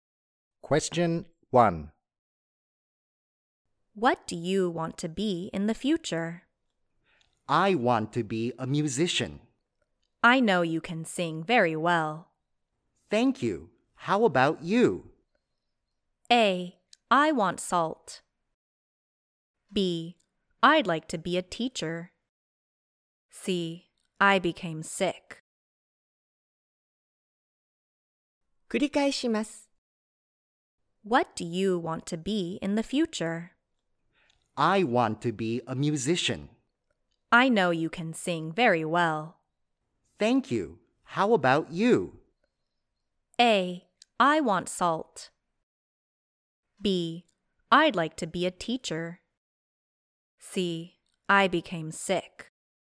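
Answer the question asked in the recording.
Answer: B: I'd like to be a teacher.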